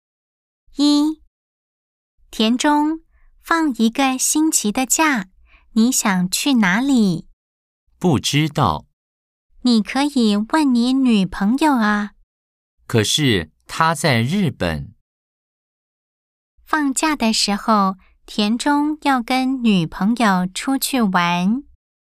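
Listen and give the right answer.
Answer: X (false)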